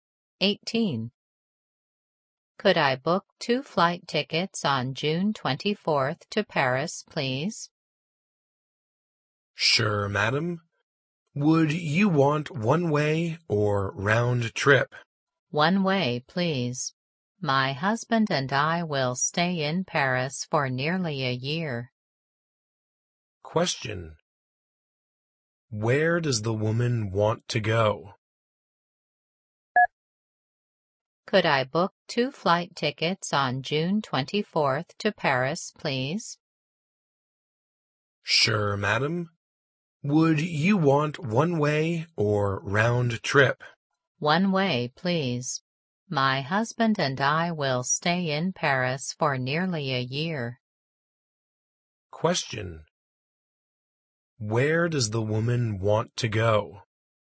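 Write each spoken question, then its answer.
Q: Where does the woman want to go?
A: Paris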